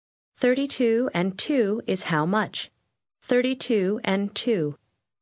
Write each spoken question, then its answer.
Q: 32 and 2 is how much? 32 and 2.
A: 34.